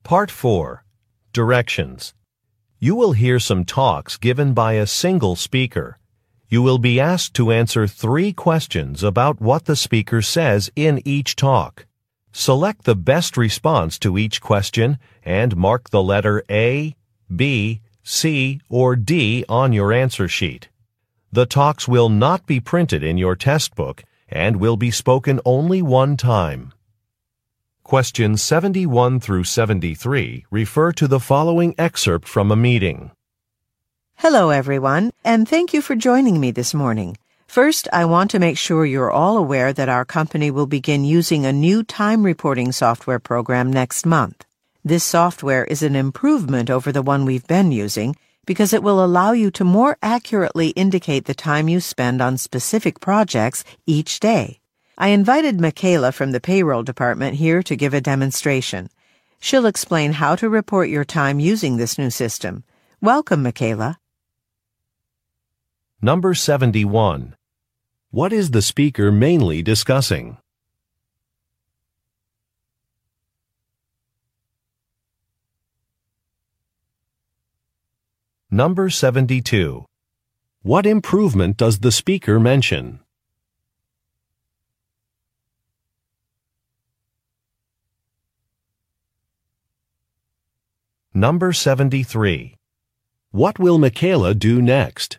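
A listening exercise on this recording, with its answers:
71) What is the speaker mainly discussing?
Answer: A software program

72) What improvement does the speaker mention?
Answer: Time on projects will be reported accurately.

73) What will Michaels do next?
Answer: Give a demonstration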